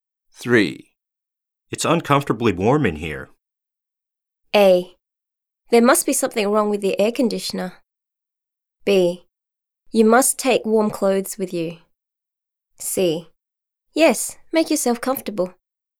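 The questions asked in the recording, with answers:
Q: It's uncomfortably warm in here.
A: A: There must be something wrong with the air conditioner.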